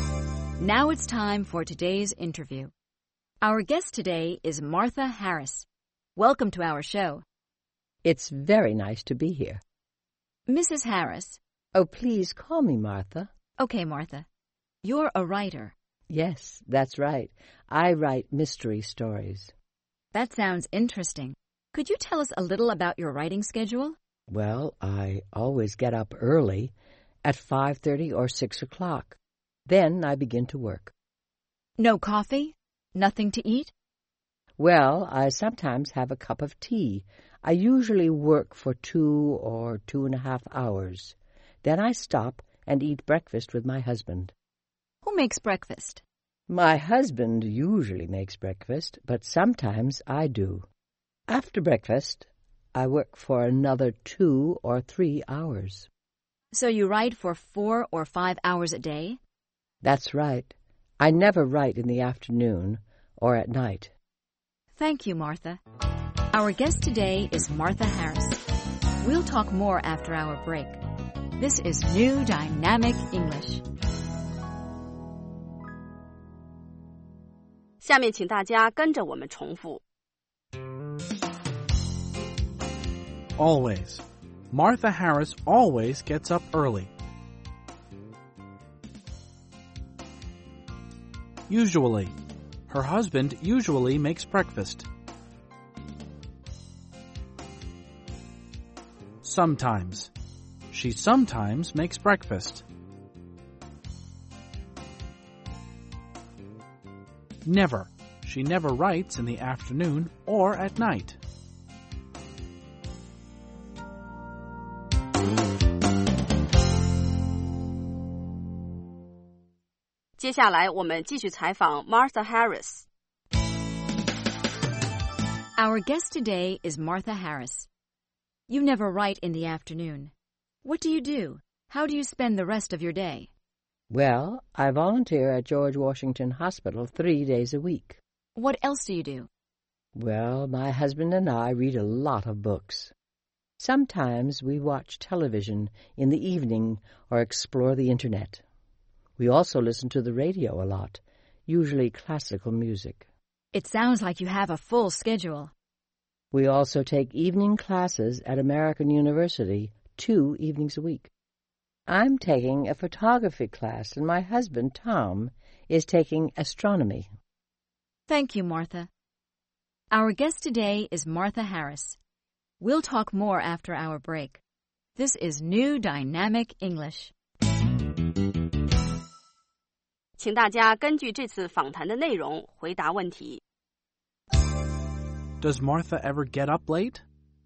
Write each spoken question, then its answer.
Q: Does Martha ever get up late?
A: No, she doesn't. She always gets up early.